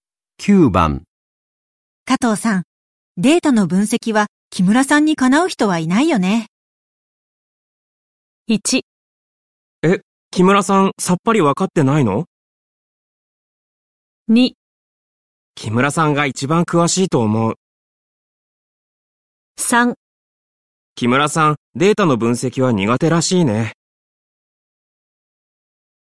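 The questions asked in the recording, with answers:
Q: 加藤さん、データの分析は木村さんにかなう人はいないよね。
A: 2: 木村さんが一番詳しいと思う。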